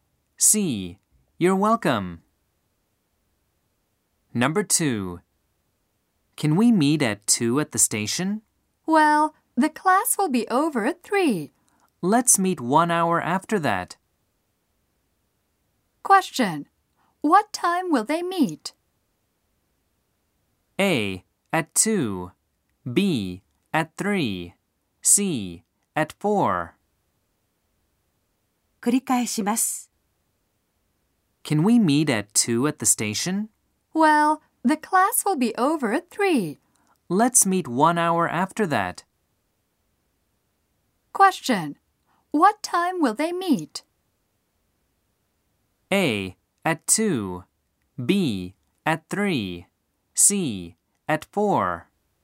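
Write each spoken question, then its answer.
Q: What time will they meet?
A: C: At 4.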